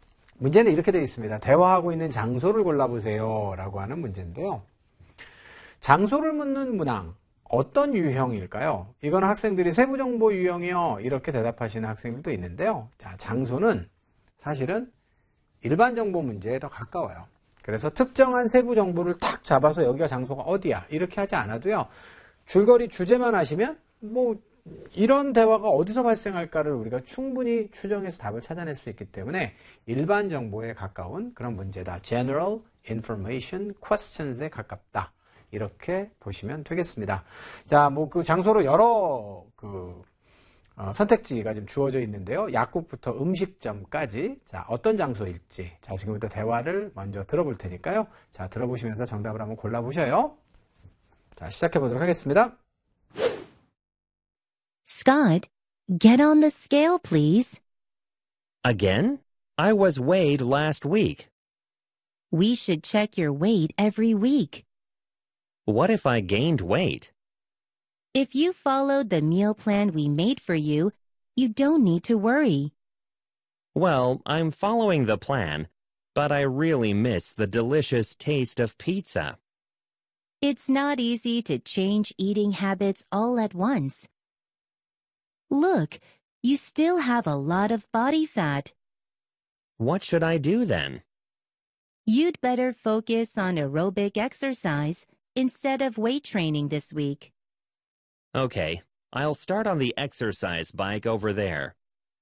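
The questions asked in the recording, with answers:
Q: 대화하고 있는 장소를 골라보세요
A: 헬스장(체육관)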